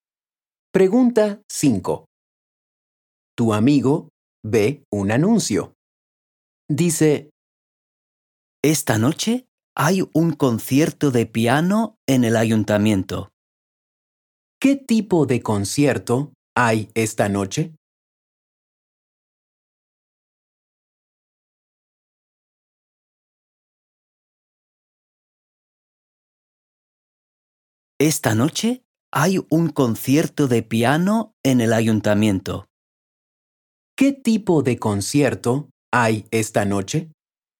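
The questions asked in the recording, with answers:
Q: ¿Qué tipo de concierto hay esta noche?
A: Un concierto de piano.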